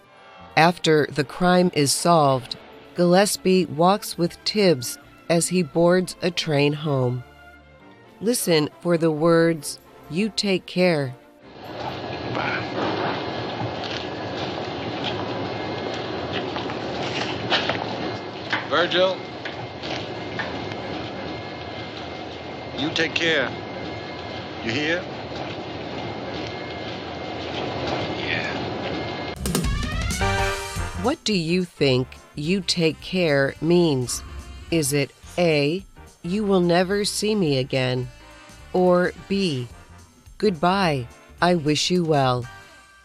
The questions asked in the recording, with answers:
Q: What do you think "you take care" means?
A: The answer is B. Take care is a way to say goodbye and wish someone well.